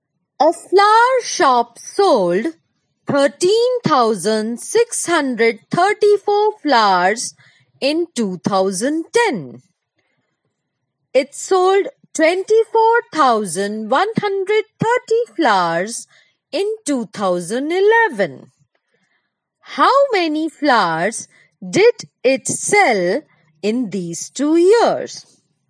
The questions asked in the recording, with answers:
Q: How many flowers did it sell in these 2 years?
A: 37,764 flowers was sold by the flower shop in these 2 years.